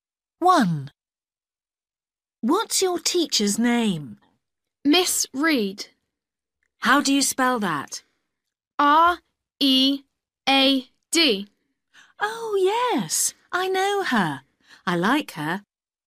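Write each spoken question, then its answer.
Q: What's your teacher's name?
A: Miss Read (R-E-A-D)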